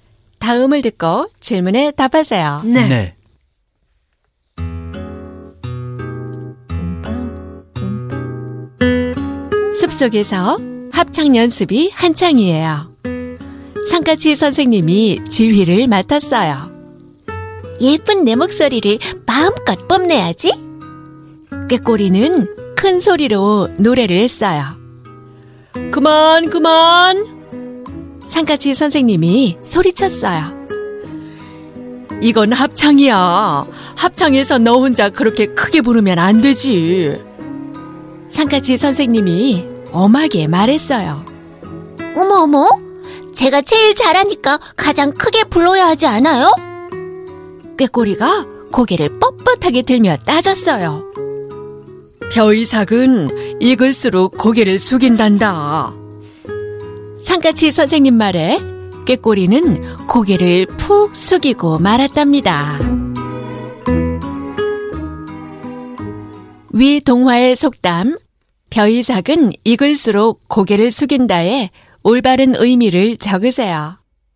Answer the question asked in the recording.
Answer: 학문과 덕이 높고 생각이 깊은 사람일수록 자신을 낮추고 겸손하게 행동한다는 뜻입니다.